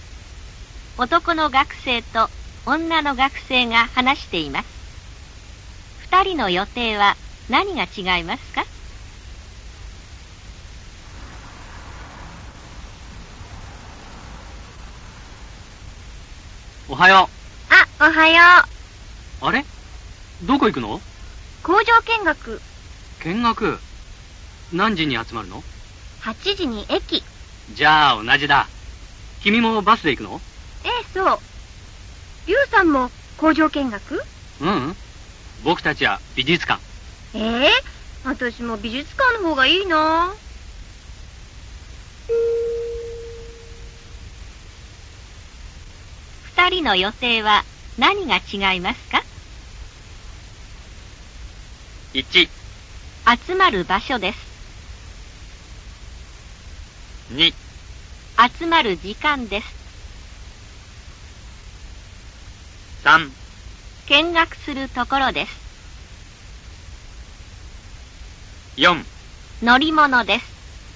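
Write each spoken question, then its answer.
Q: 二人の予定は何が違いますか?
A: 3: 見学するところです。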